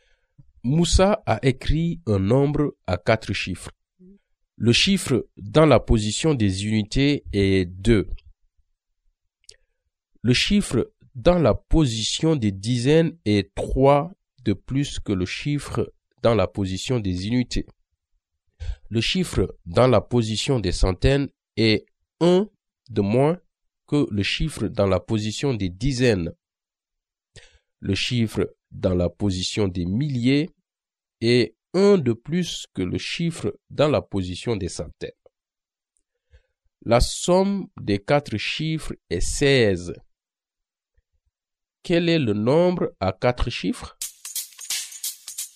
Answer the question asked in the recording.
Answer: 5452.